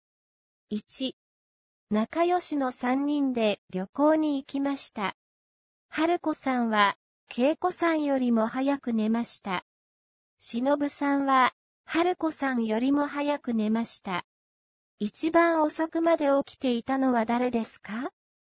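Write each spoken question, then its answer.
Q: 一番遅くまで起きていたのは誰ですか?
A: 恵子さん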